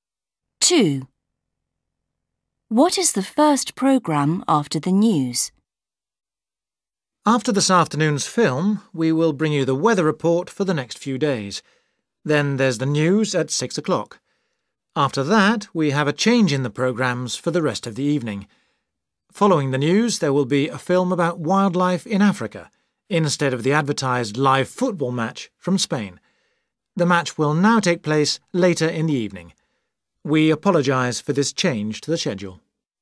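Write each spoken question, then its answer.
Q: What is the first programme after the news?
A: a film about wildlife in Africa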